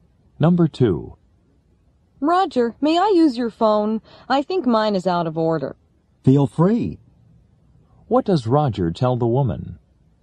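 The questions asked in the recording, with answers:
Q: What does Roger tell the woman?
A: She is welcome to use his phone.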